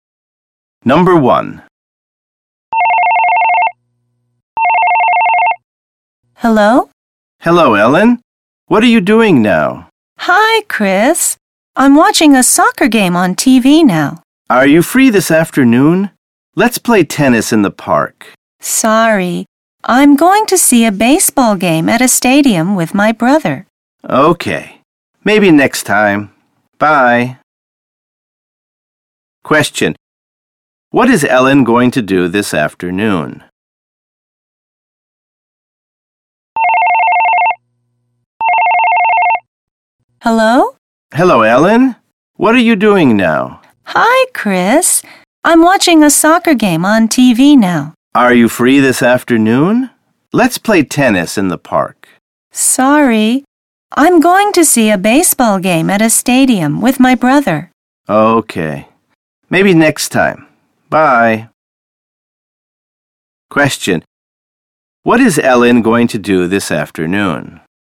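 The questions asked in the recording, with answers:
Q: What is Ellen going to do this afternoon?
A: See a baseball game at a stadium with her brother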